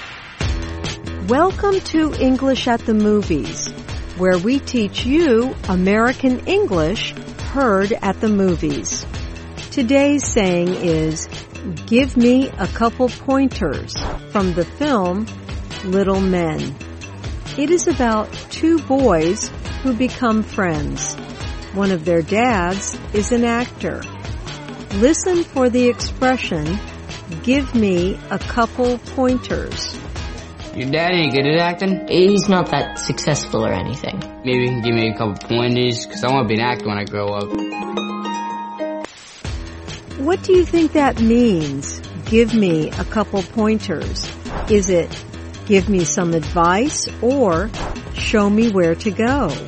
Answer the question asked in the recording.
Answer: Give me a couple pointers means give me some advice.